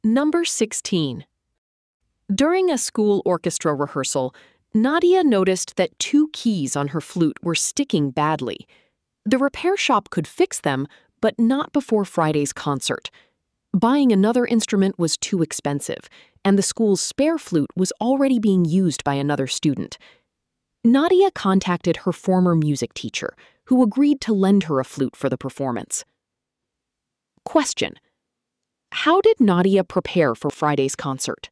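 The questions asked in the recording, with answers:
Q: how did Nadia prepare for Friday's concert?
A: She borrowed a flute from her former music teacher.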